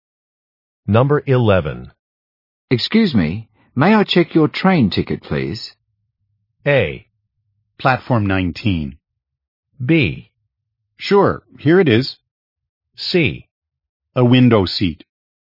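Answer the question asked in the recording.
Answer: B: Sure, here it is.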